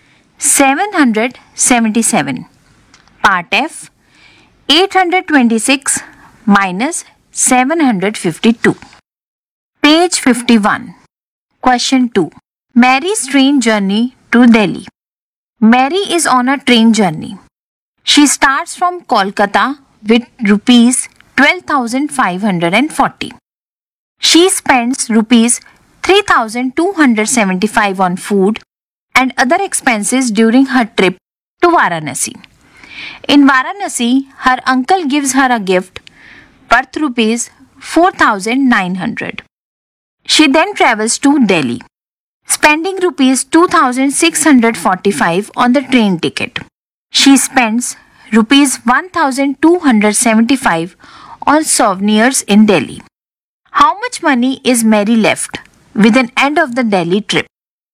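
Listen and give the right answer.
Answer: Rupees 10,245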